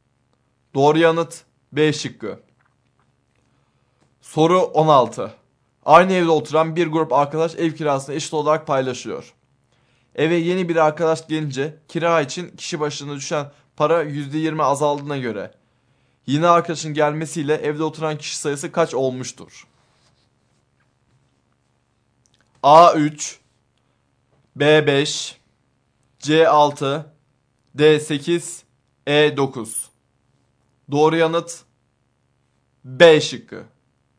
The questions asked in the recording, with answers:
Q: Eve yeni bir arkadaş gelince kira için kişi başına düşen para %20 azaldığına göre yeni arkadaşın gelmesiyle evde oturan kişi sayısı kaç olmuştur?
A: Doğru yanıt B şıkkı.